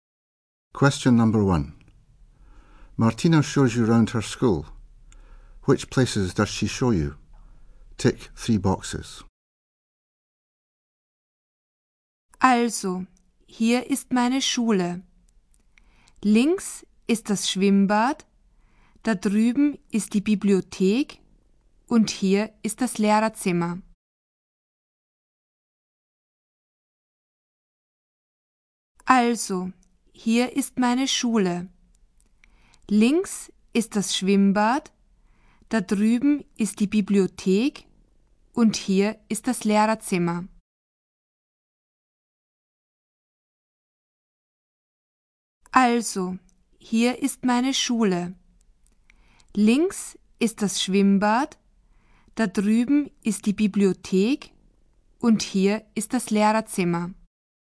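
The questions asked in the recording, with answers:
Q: Which places does she show you?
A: Swimming pool, library and staffroom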